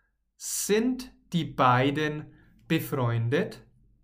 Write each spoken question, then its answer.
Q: Sind die beiden befreundet?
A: Ja, sie sind befreundet. Sie sind sogar beste Freunde.